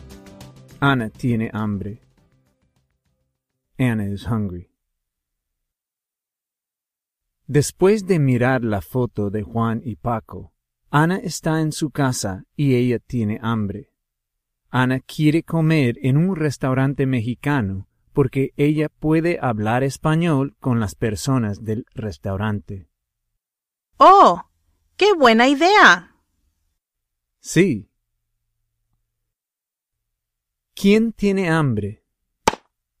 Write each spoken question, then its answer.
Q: ¿Quién tiene hambre?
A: Ana tiene hambre.